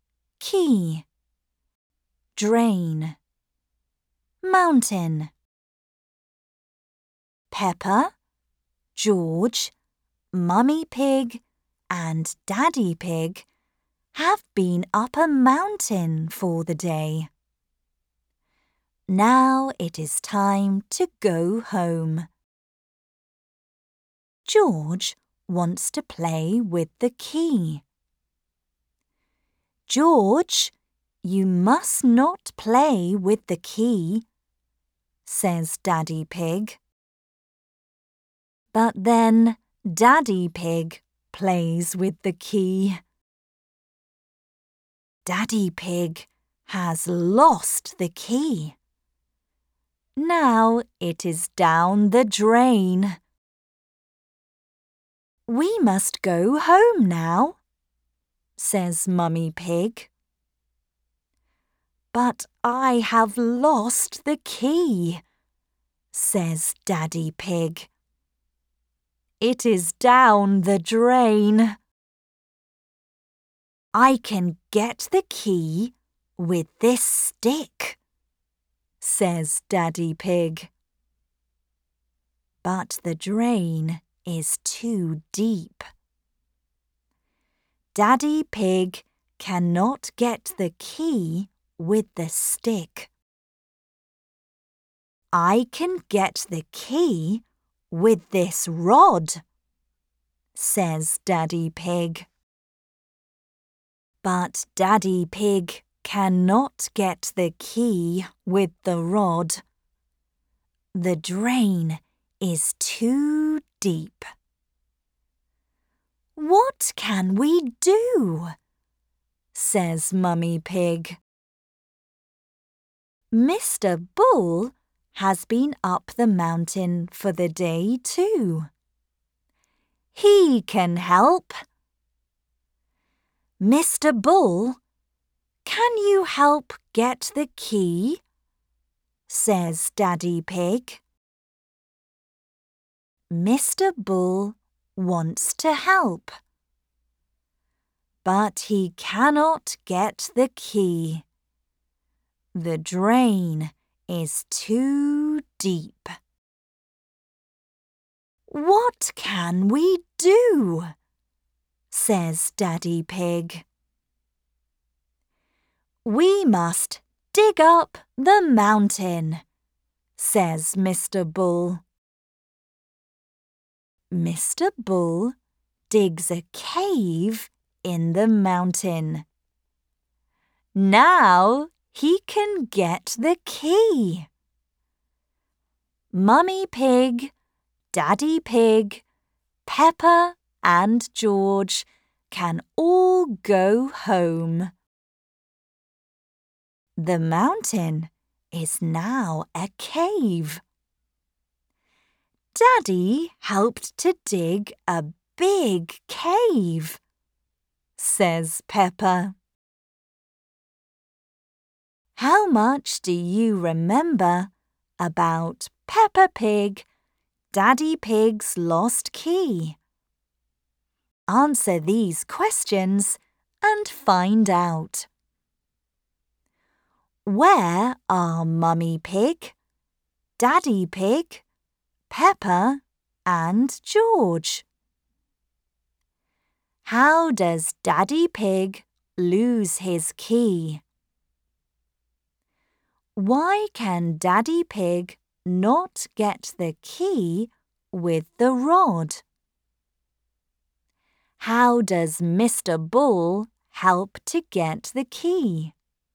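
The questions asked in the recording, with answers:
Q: Where are Mummy Pig, Daddy Pig, Peppa and George?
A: Up a mountain

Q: How does Daddy Pig lose his key?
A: He plays with it and it goes down the drain

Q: Why can Daddy Pig not get the key with the rod?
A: The drain is too deep

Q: How does Mr. Bull help to get the key?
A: He digs a cave in the mountain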